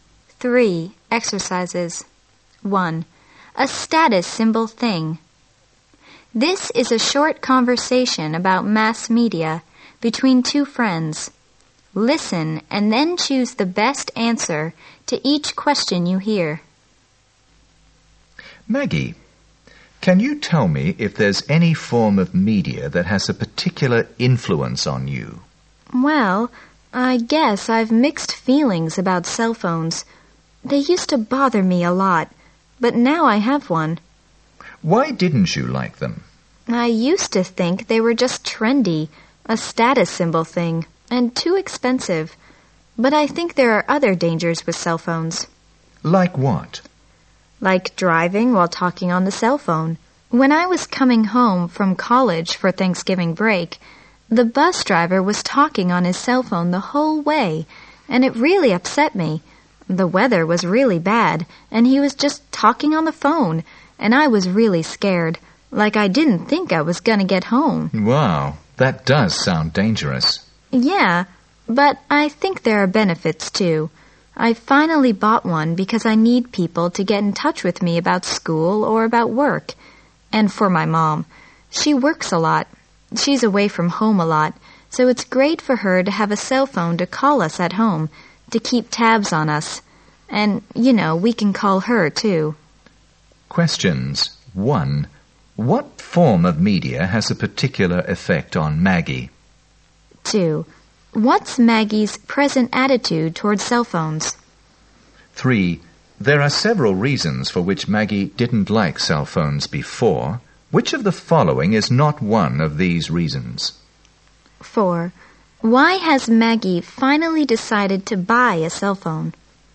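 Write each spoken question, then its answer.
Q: What form of media has a particular effect on Maggie?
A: Cell phones

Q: What's Maggie's present attitude toward cell phones?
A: Mixed feelings; she now has one and sees benefits as well as dangers

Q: Why has Maggie finally decided to buy a cell phone?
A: She needs people to be able to reach her about school or work, and her mom can call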